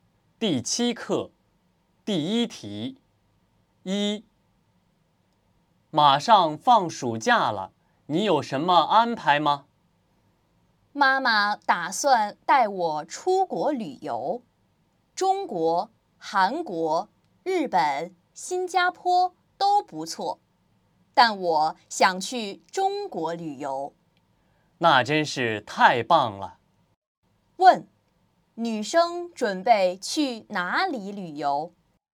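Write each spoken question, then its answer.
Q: 女生准备去哪里旅游?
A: 中国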